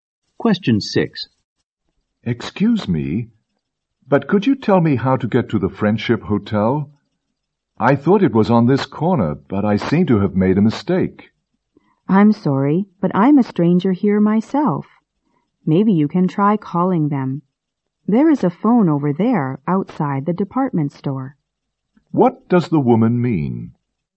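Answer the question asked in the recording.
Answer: She doesn't know the way; he could phone the hotel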